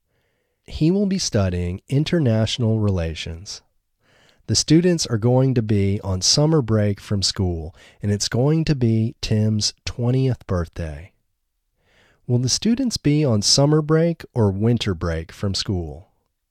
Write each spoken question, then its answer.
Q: Will the students be on summer break or winter break from school?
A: The students will be on summer break from school.